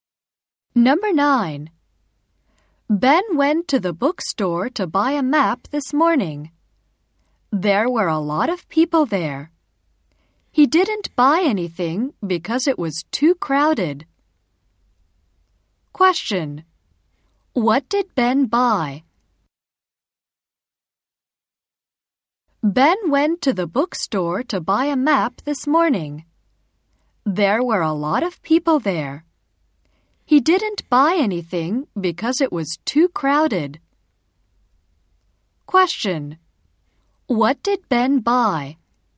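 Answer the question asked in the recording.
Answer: Nothing.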